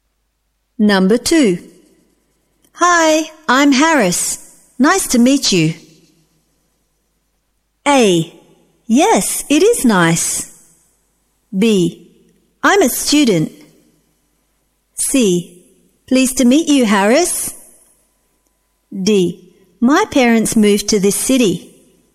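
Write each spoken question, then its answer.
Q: Hi, I'm Harris.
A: C: Pleased to meet you, Harris.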